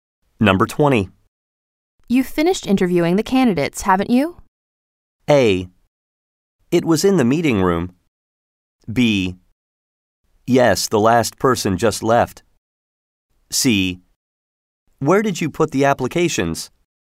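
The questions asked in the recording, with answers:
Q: You've finished interviewing the candidates, haven't you?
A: B: Yes, the last person just left.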